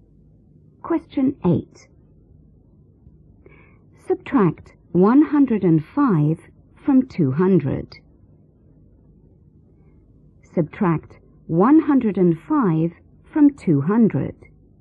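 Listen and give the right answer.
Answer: 95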